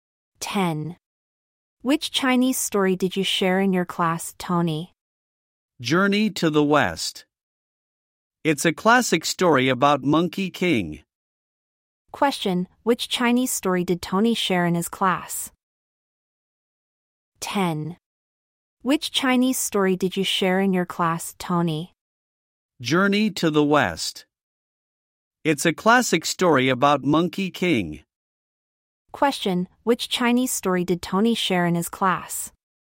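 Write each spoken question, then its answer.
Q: which Chinese story did Tony share in his class?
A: Journey to the West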